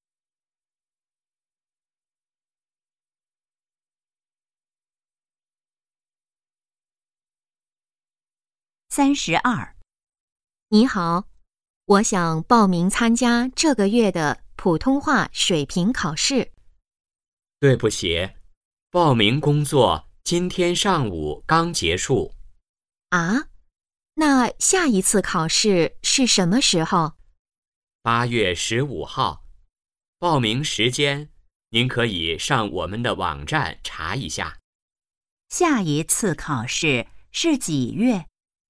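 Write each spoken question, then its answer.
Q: 下一次考试是几月?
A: 8月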